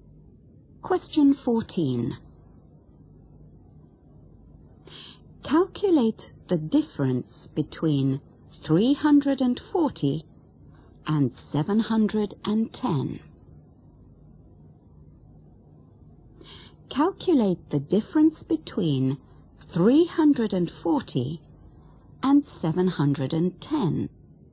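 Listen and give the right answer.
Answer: 370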